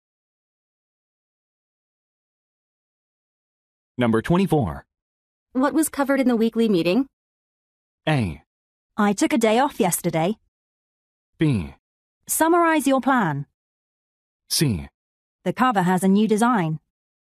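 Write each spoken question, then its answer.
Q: What was covered in the weekly meeting?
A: A: I took a day off yesterday.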